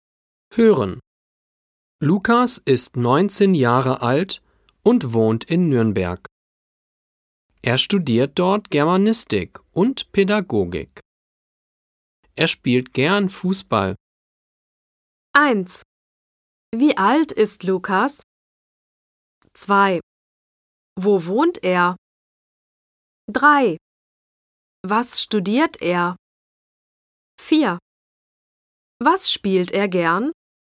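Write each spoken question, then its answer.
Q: Wie alt ist Lukas?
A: 19 Jahre alt

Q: Wo wohnt er?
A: In Nürnberg

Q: Was studiert er?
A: Germanistik und Pädagogik

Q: Was spielt er gern?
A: Fußball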